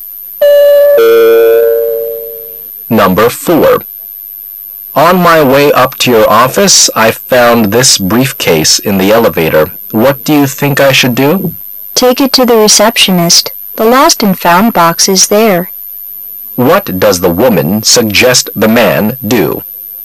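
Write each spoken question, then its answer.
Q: What does the woman suggest the man do?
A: Take the briefcase to the receptionist

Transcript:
[解析] M: On my way up to your office I found this briefcase in the elevator. What do you think I should do? W: Take it to the receptionist. The lost-and-found box is there. Q: What does the woman suggest the man do?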